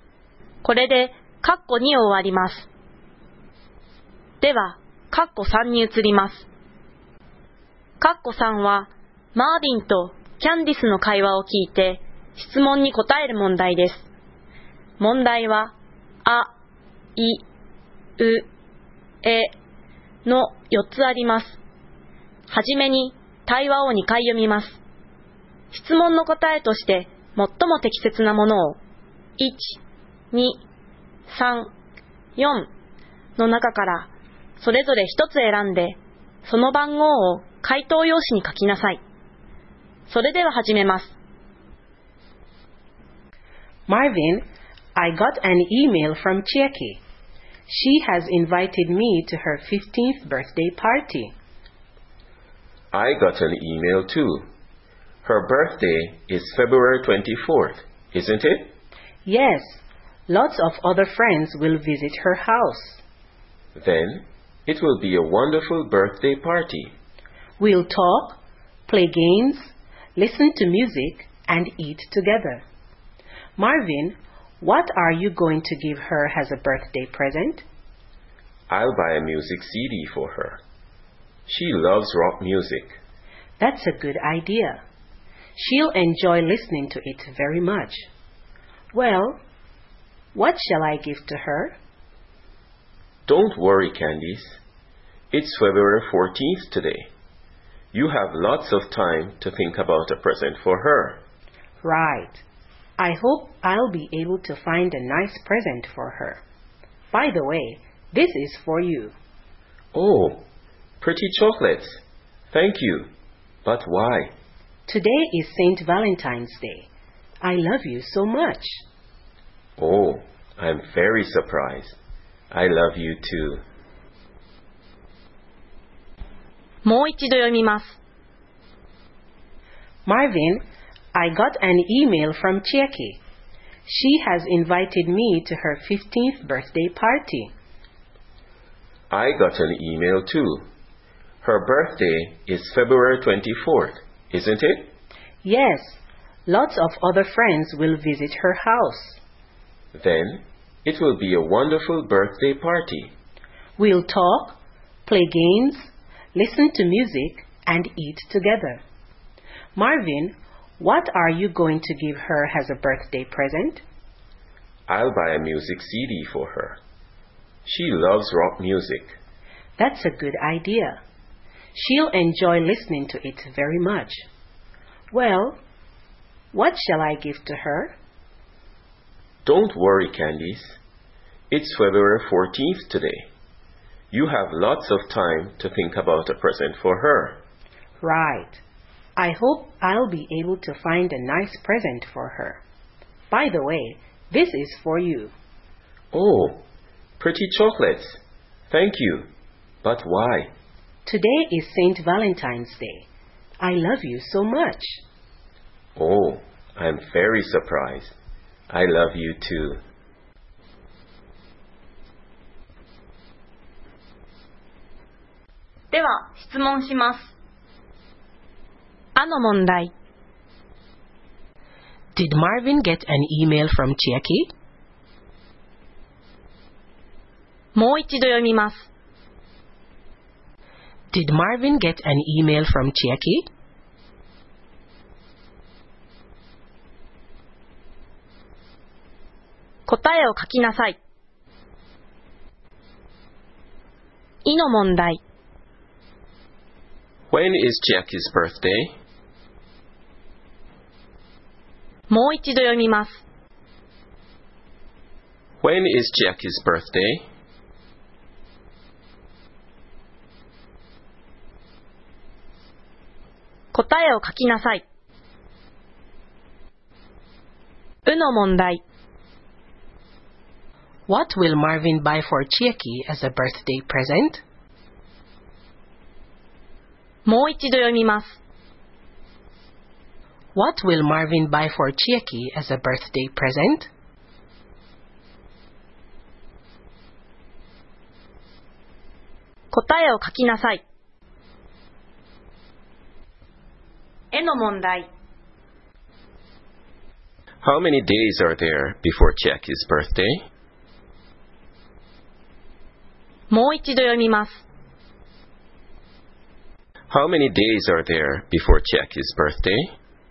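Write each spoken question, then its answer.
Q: Did Marvin get an email from Chieke?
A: Yes, he did.

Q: When is Chieke's birthday?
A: February 24th

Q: What will Marvin buy for Chieke as a birthday present?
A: A music CD

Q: How many days are there before Chieke's birthday?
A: 10 days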